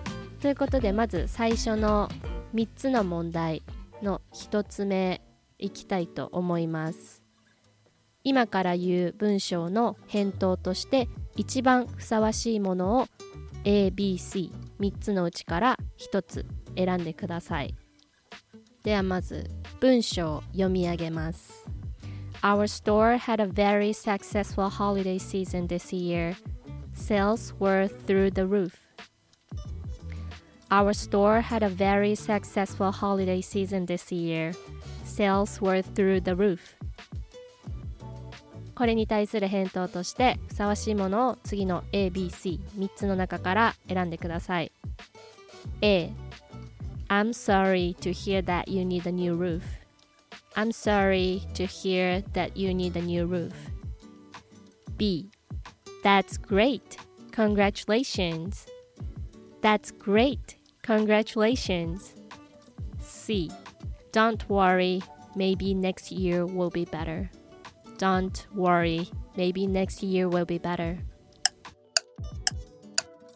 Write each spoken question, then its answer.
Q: これに対する返答としてふさわしいものを次の ABC3 つの中から選んでください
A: 正解は B That's great! Congratulations!